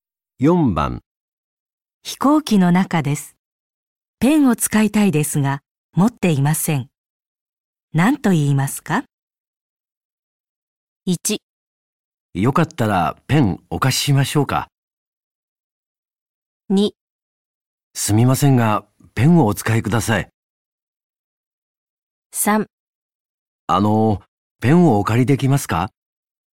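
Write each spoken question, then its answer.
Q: 飛行機の中です。ペンを使いたいですが、持っていません。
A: 3: ペンをお借りできますか。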